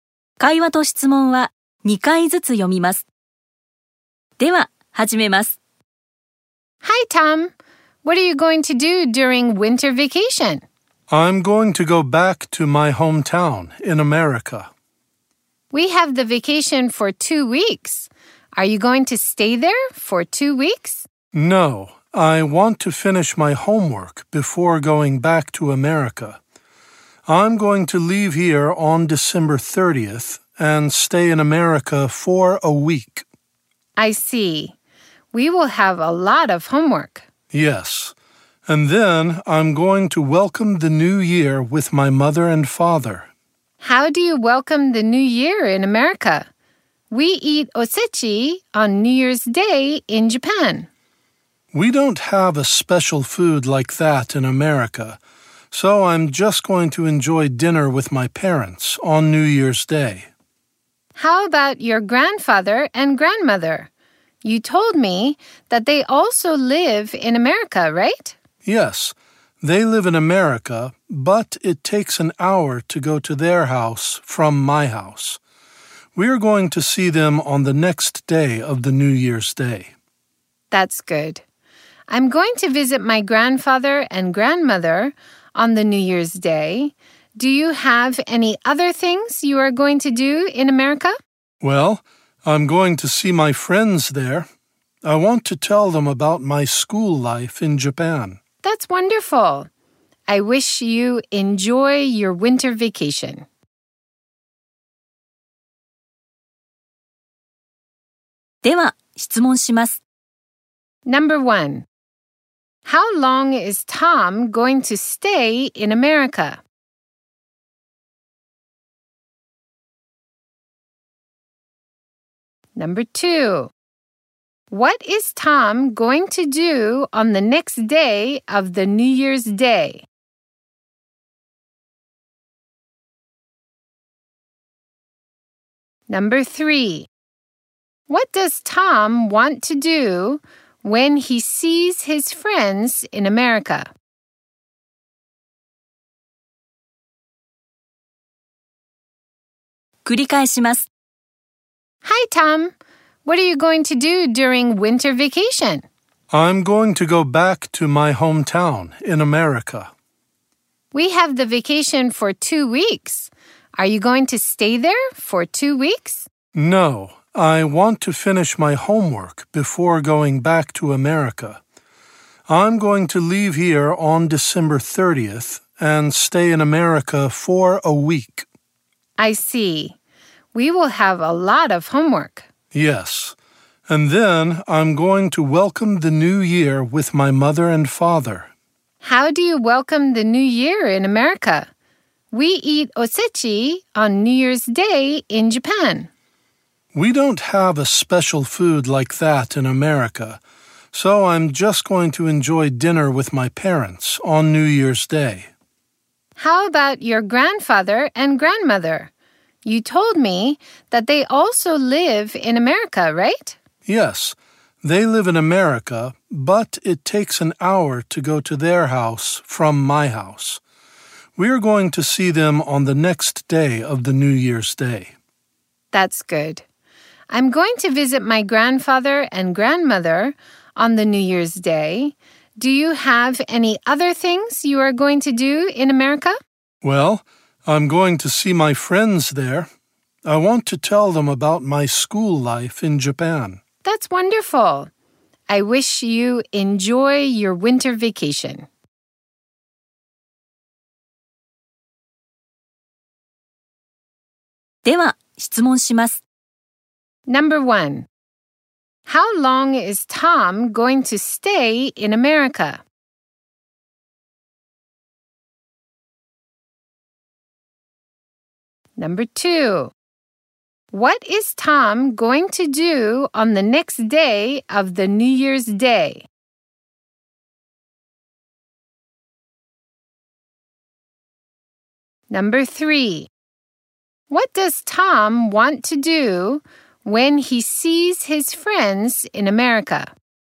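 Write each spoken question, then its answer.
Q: How long is Tom going to stay in America?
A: For a week.

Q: What is Tom going to do on the next day of the New Year's Day?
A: He is going to see his grandfather and grandmother.

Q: What does Tom want to do when he sees his friends in America?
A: He wants to tell them about his school life in Japan.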